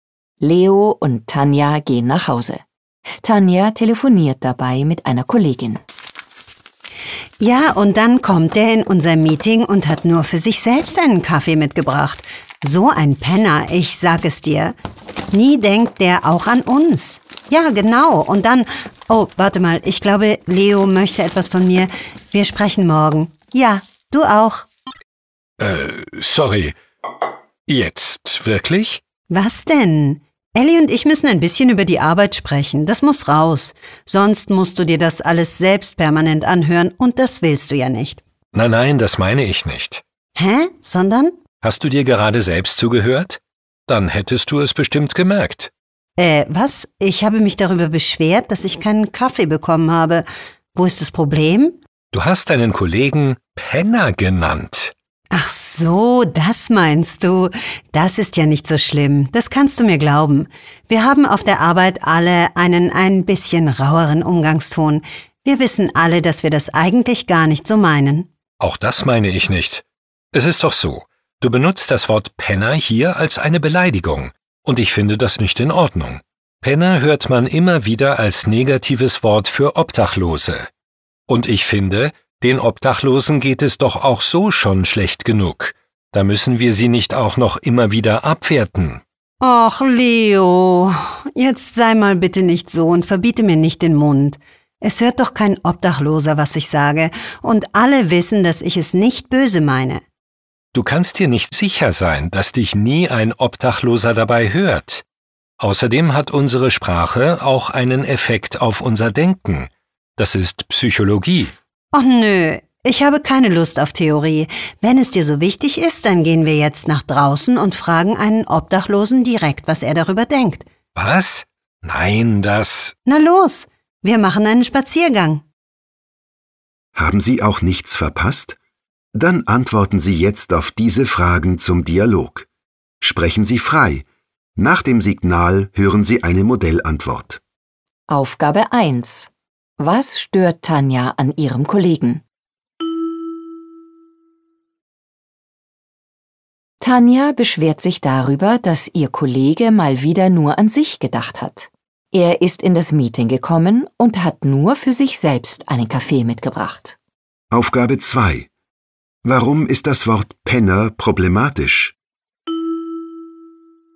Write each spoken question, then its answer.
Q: Was stört Tanja an ihrem Kollegen?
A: Tanja beschwert sich darüber, dass ihr Kollege mal wieder nur an sich gedacht hat.

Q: Warum ist das Wort Penner problematisch?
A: Dieses Wort wird abwertend für Menschen ohne Wohnung benutzt.